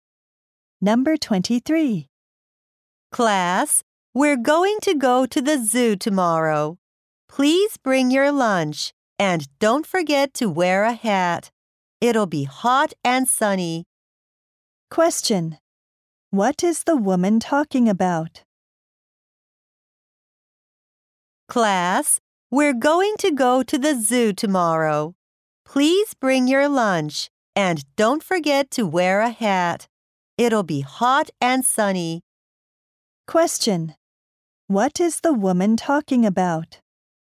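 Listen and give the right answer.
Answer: A class trip to the zoo tomorrow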